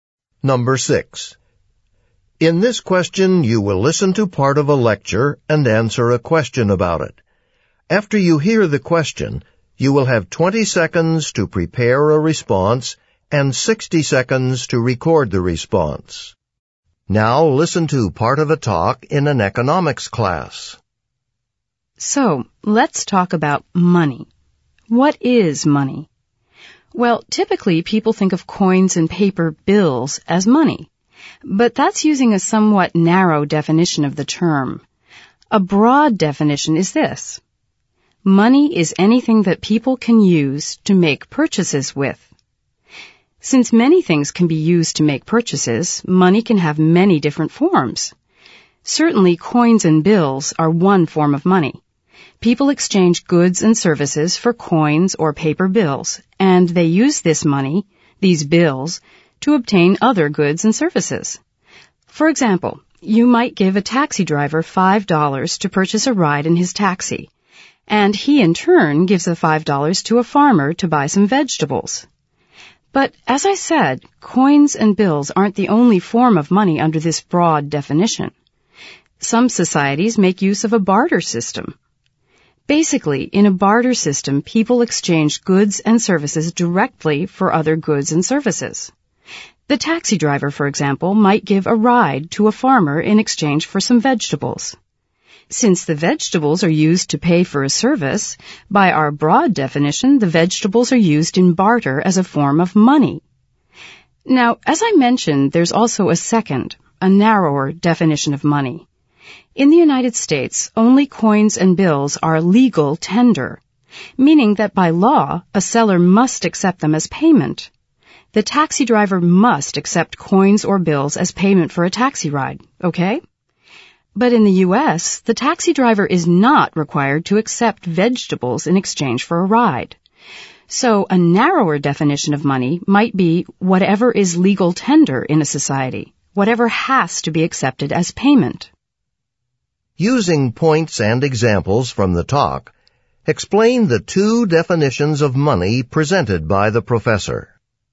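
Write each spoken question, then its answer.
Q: Using points and examples from the talk, explain the two definitions of money presented by the professor.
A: Broad: money is anything used to make purchases (coins, bills, or goods in barter, like vegetables for a taxi ride). Narrow: only legal tender, which a seller must accept as payment (coins and bills in the U.S.).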